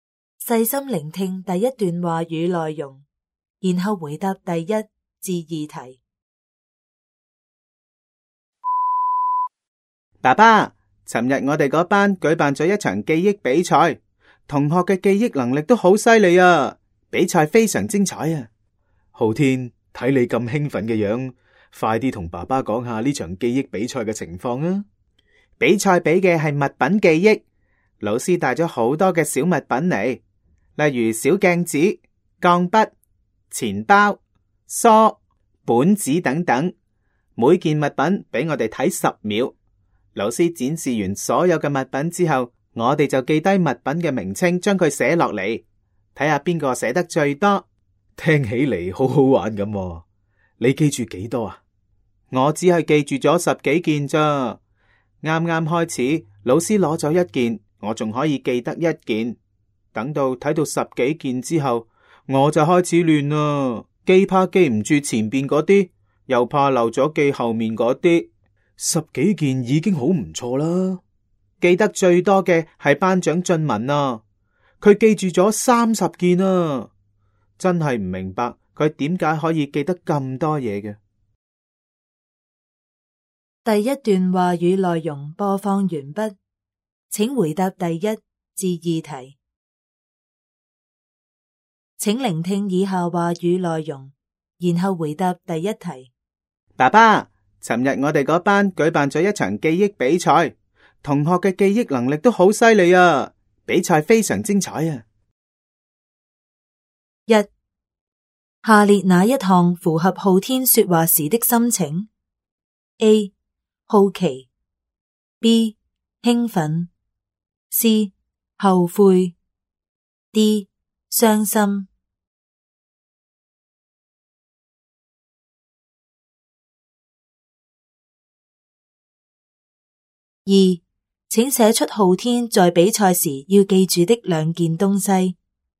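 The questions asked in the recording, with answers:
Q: 下列哪一项符合浩天说话时的心情 ?A. 好奇 ,B. 兴奋 ,C. 后悔 ,D. 伤心。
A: B: 兴奋

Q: 请写出浩天在比赛时要记住的两件东西。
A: 小镜子、钢笔(或钱包、梳、本子)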